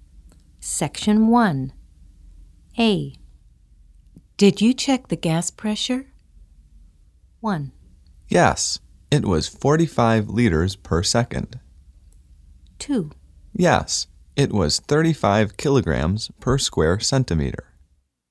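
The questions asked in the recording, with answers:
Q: Did you check the gas pressure?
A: 2: Yes, it was 35 kilograms per square centimeter.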